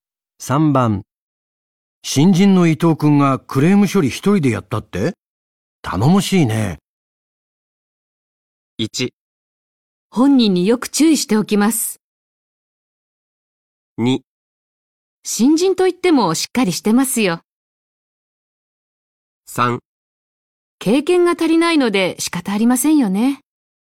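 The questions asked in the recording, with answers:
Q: 新人の伊藤君がクレーム処理一人でやったって頼もしいね。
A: 2: 新人といってもしっかりしてますよ。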